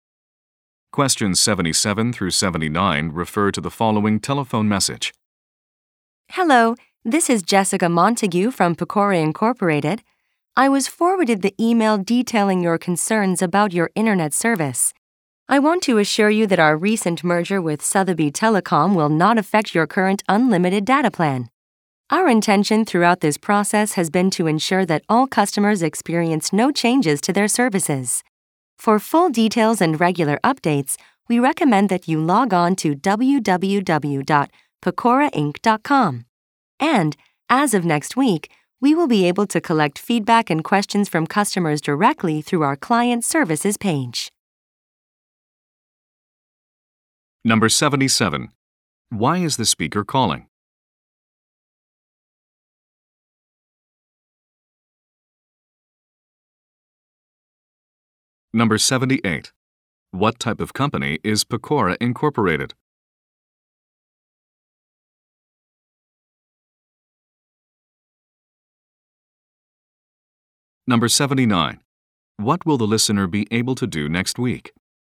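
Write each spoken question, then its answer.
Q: Why is the speaker calling?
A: To respond to a customer's concerns about internet service

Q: What type of company is Pecora Incorporated?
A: An internet service provider

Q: What will the listener be able to do next week?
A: Give feedback through the client services page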